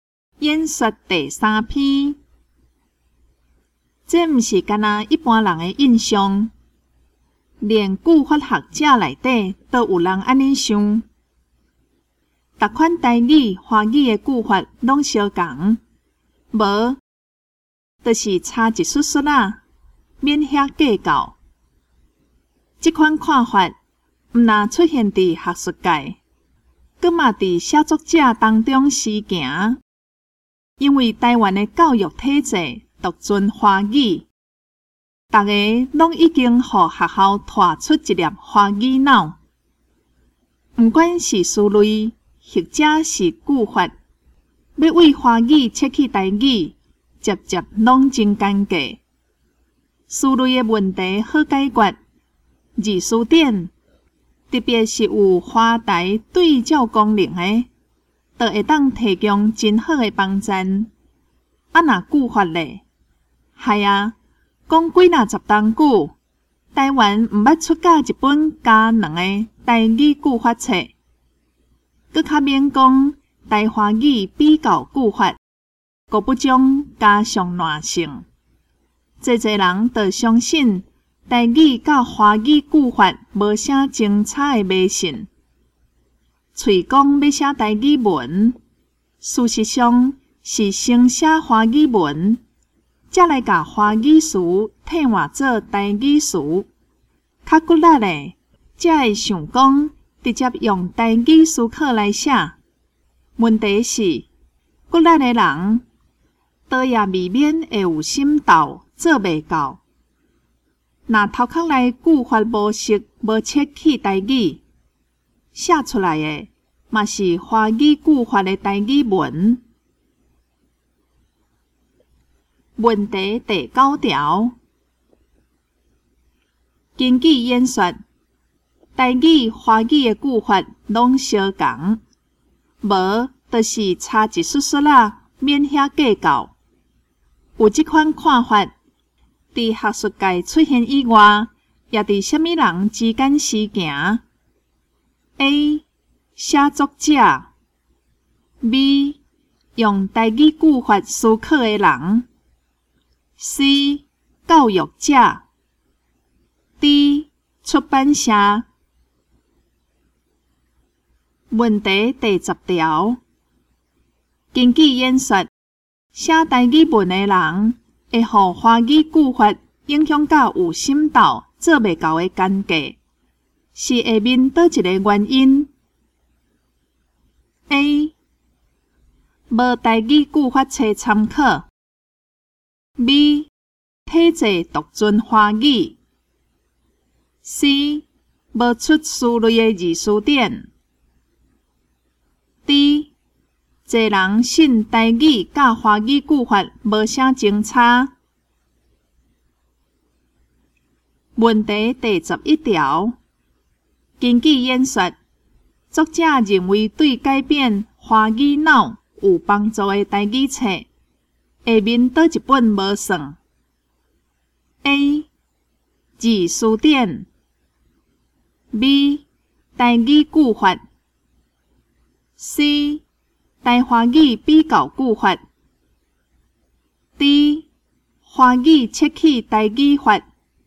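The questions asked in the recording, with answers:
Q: 根据演说,台语、华语的句法拢相同,无就是差一丝丝啦,免遐计较。有这款看法,伫学术界出现以外,也伫虾米人之间时行。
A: A: 写作者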